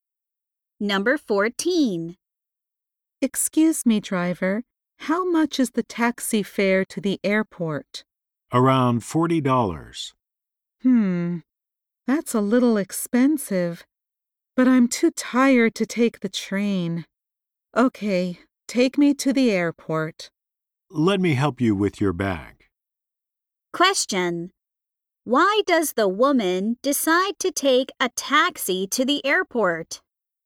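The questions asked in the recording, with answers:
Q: Why does the woman decide to take a taxi to the airport?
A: She is too tired to take the train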